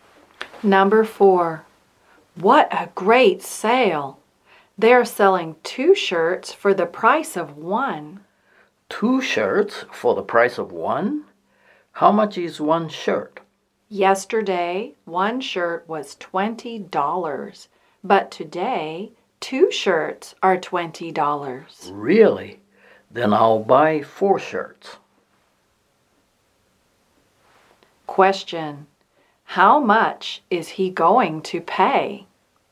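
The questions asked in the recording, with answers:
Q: How much is he going to pay?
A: $40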